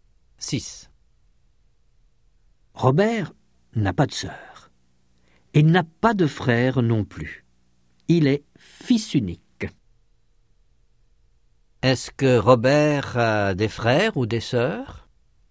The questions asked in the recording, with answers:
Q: Est-ce que Robert a des frères ou des sœurs?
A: Non, il est fils unique.